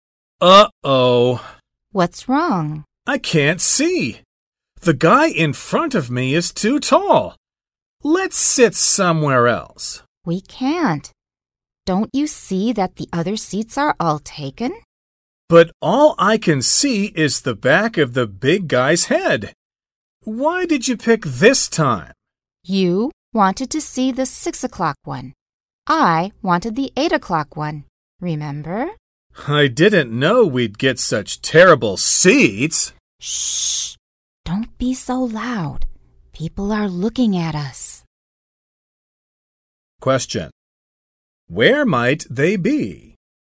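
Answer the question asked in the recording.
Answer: In a movie theater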